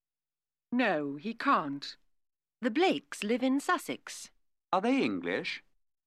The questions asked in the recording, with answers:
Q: Are they English?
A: Yes, they are.